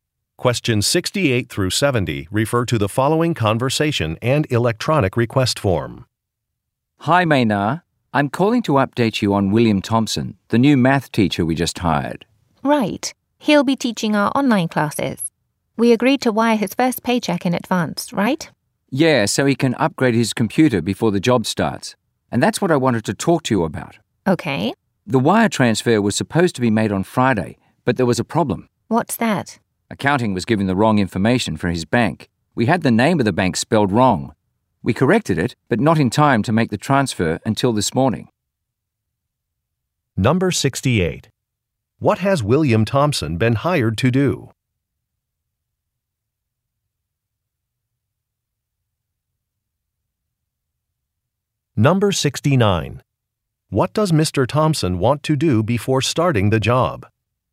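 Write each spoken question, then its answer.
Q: What has William Thompson been hired to do?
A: Teach math online

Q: What does Mr. Thompson want to do before starting the job?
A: Upgrade his computer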